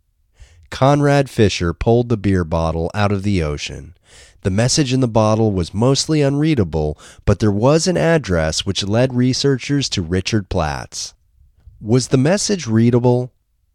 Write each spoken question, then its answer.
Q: Was the message readable?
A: No, the message was mostly unreadable.